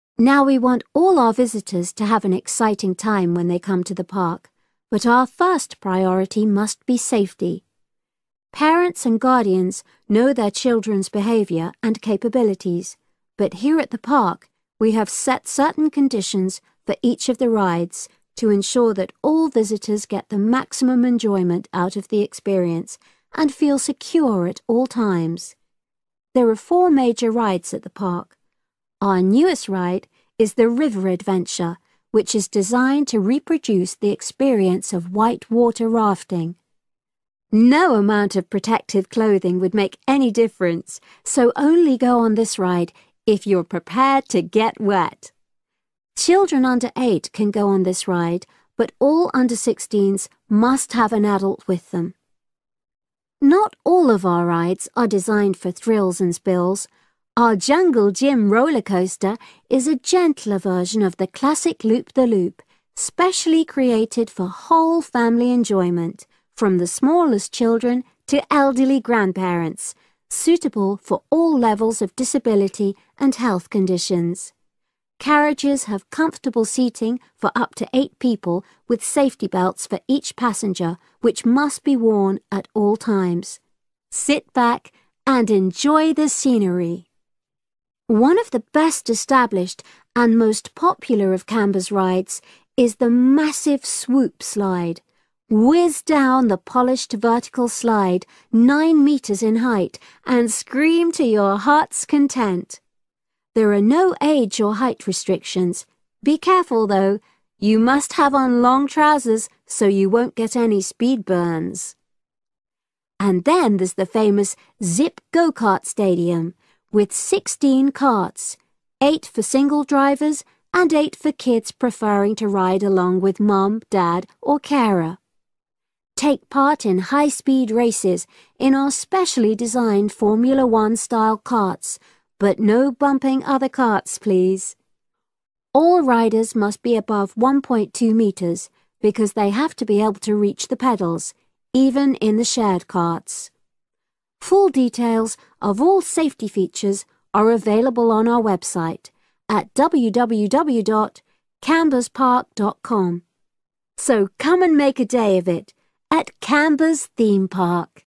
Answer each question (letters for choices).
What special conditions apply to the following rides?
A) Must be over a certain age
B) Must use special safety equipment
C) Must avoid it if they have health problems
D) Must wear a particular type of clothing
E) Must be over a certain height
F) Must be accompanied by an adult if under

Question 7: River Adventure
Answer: F

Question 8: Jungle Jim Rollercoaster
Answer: B

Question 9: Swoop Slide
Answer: D

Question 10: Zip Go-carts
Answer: E

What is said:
We have a total of seven different catering outlets on the site. We're open ten to five thirty all year round and cold drinks and snacks can be bought at any time during opening hours. And hot food is available most of the day in the Hungry Horse cafe – from eleven until five – just half an hour before closing time.
Presenter: Now we want all our visitors to have an exciting time when they come to the park but our first priority must be safety. Parents and guardians know their children's behaviour and capabilities. But here at the park we have set certain conditions for each of the rides to ensure that all visitors get the maximum enjoyment out of the experience and feel secure at all times. There are four major rides at the park. Our newest ride is the River Adventure which is designed to reproduce the experience of white-water rafting. No amount of protective clothing would make any difference so only go on this ride if you're prepared to get wet! Children under eight can go on this ride, but all under sixteens must have an adult with them.
Not all of our rides are designed for thrills and spills. Our Jungle Jim rollercoaster is a gentler version of the classic loop the loop, specially created for whole family enjoyment – from the smallest children to elderly grandparents, suitable for all levels of disability and health conditions. Carriages have comfortable seating for up to eight people, with safety belts for each passenger which must be worn at all times. Sit back and enjoy the scenery!
One of the best established and most popular of Camber's rides is the massive Swoop Slide. Whizz down the polished vertical slide nine metres in height and scream to your heart's content. There are no age or height restrictions. Be careful though – you must have on long trousers so you won't get any speed burns!
And then there's the famous Zip Go-kart stadium with sixteen carts: eight for single drivers and eight for kids preferring to ride along with mum, dad or carer. Take part in high-speed races in our specially designed Formula One-style karts – but no bumping other karts, please. All riders must be above one point two metres because they have to be able to reach the pedals ... even in the shared karts.
Full details of all safety features are available on our website at www.Camberspark.com.
So come and make a day of it at Camber's Theme Park!